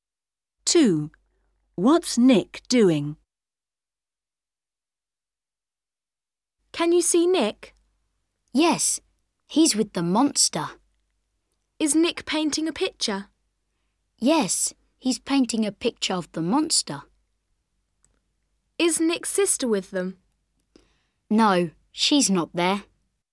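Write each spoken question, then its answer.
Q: What's Nick doing?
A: painting a picture of the monster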